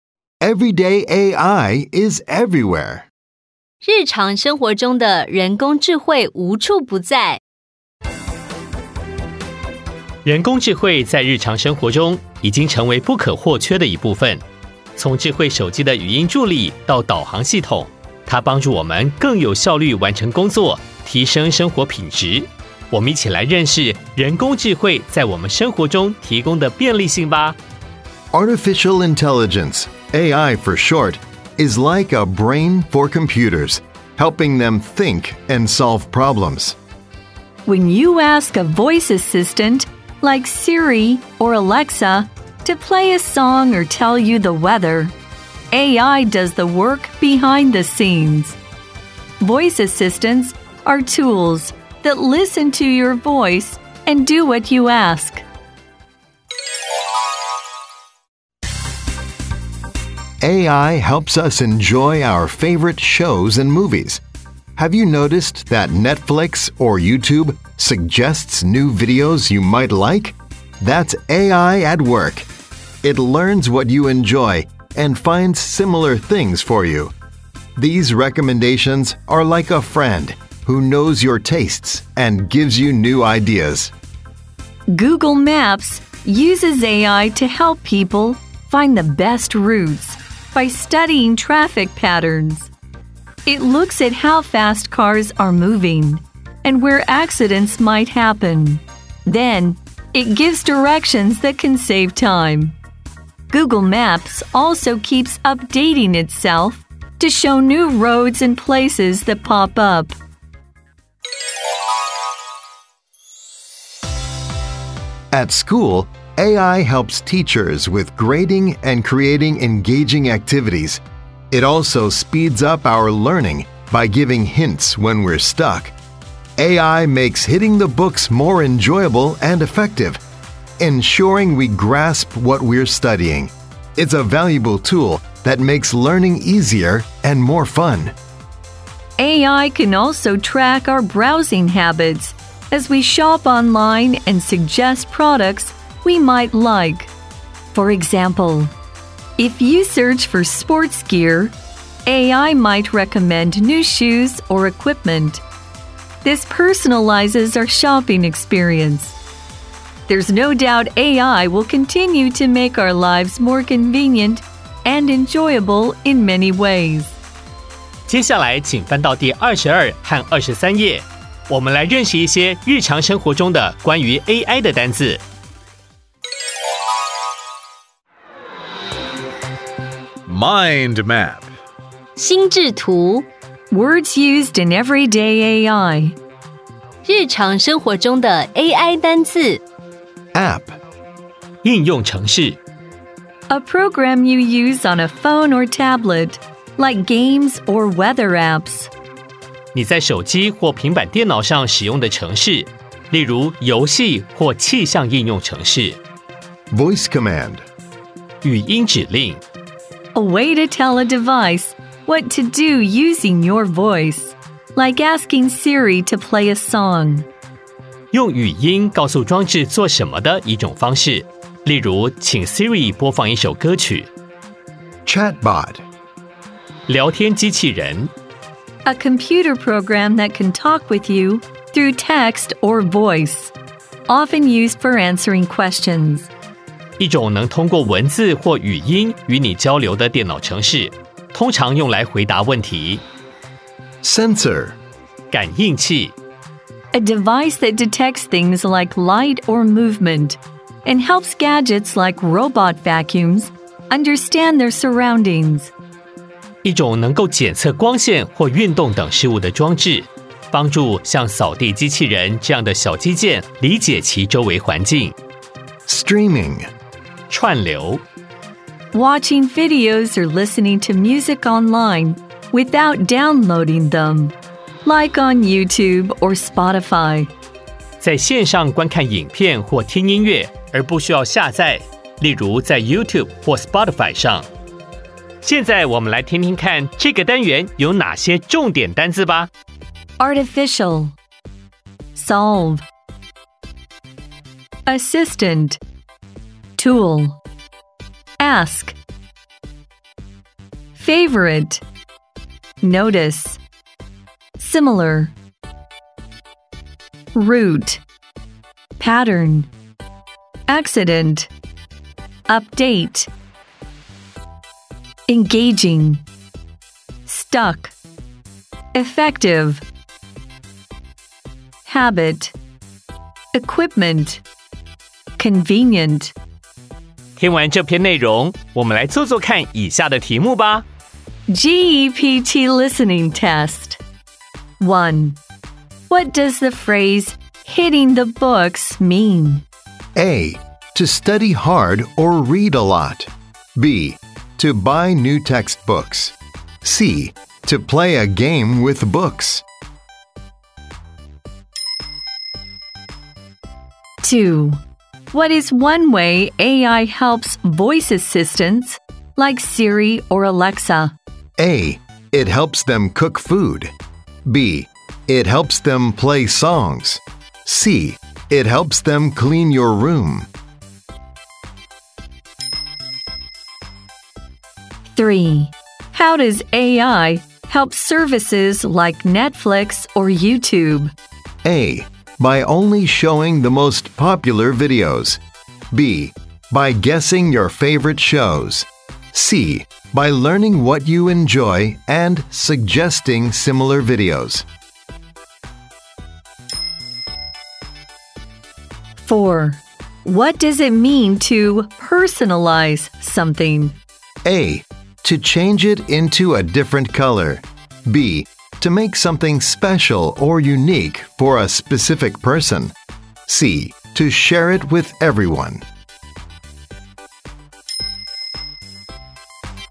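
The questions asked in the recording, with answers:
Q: What does the phrase hitting the books mean?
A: A: To study hard or read a lot.

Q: What is one way AI helps voice assistants like Siri or Alexa?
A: B: It helps them play songs.

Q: How does AI help services like Netflix or YouTube?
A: C: By learning what you enjoy and suggesting similar videos.

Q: What does it mean to personalize something?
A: B: To make something special or unique for a specific person.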